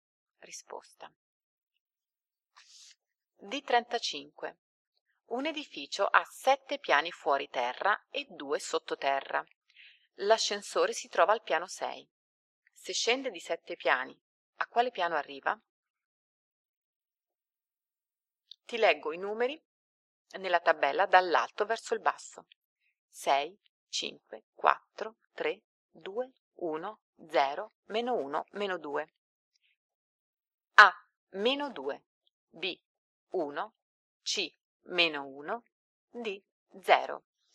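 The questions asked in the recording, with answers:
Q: Se scende di 7 piani, a quale piano arriva?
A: C: meno 1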